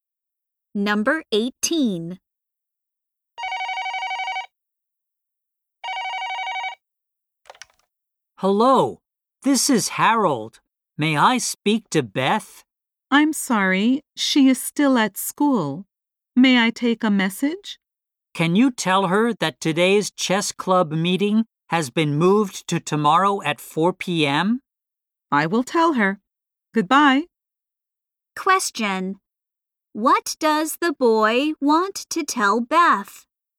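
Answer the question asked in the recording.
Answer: Today's chess club meeting has been moved to tomorrow at 4 p.m.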